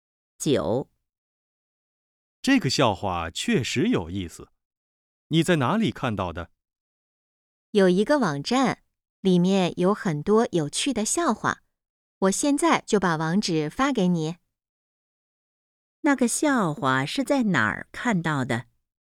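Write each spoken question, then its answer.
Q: 那个笑话是在哪儿看到的?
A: 在一个网站上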